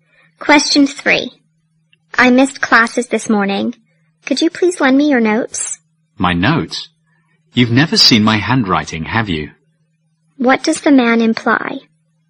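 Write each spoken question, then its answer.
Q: What does the man imply?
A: His handwriting is hard to read.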